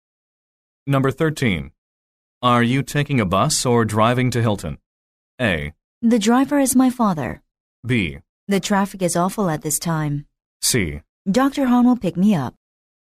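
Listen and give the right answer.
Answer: C: Dr. Hahn will pick me up.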